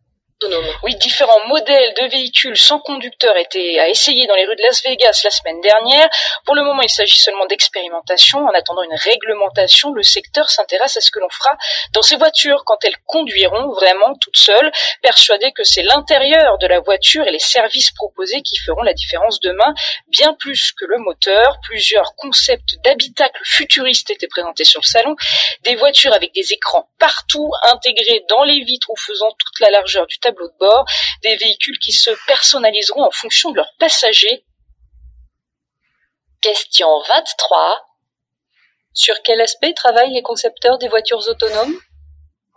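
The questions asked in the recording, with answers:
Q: Sur quel aspect travaillent les concepteurs des voitures autonomes ?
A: L'intérieur de la voiture (l'habitacle) et les services proposés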